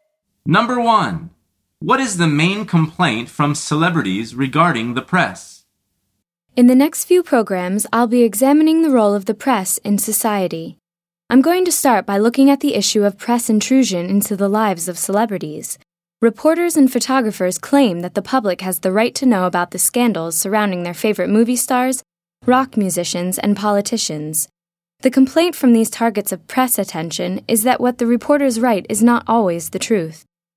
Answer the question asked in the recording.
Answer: The answer is that what reporters write isn't always true.